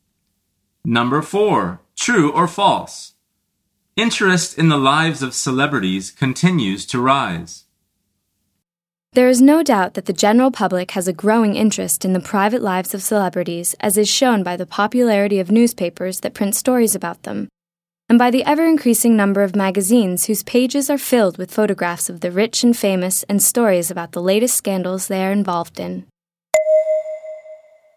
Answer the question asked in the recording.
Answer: The answer is true.